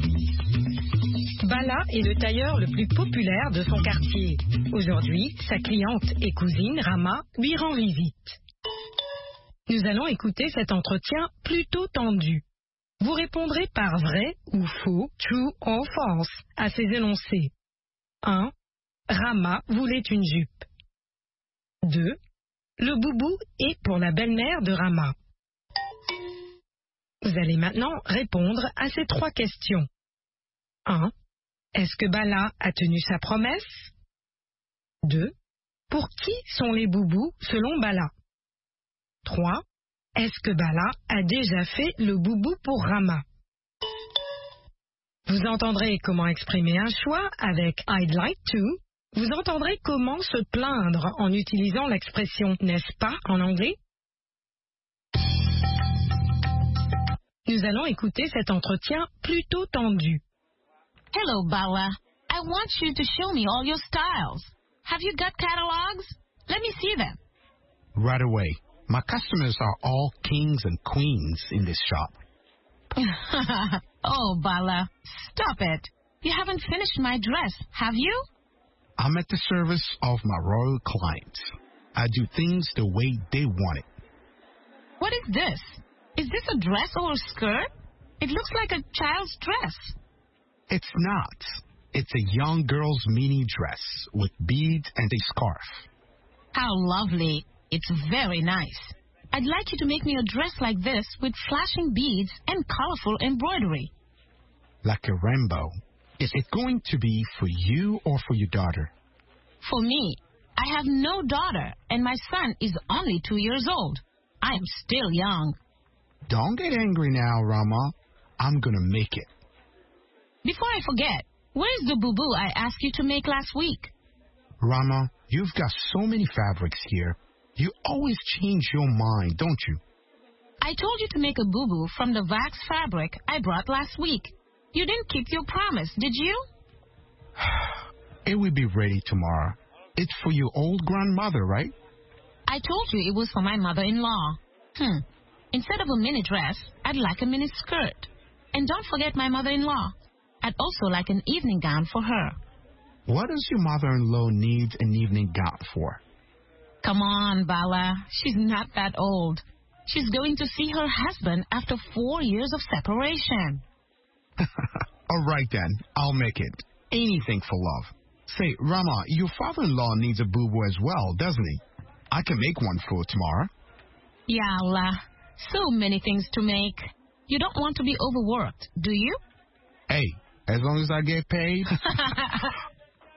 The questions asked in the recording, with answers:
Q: Le boubou est pour la belle-mère de Rama.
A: L'énoncé 2 est vrai.

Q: Est-ce que Bala a tenu sa promesse?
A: Non.

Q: Pour qui sont les boubous selon Bala?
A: Pour les personnes âgées.

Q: Est-ce que Bala a déjà fait le boubou pour Rama?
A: Pas encore.